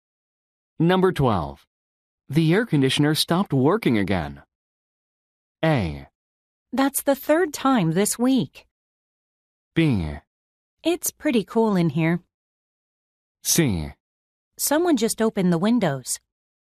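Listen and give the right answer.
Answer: A: That's the 3rd time this week.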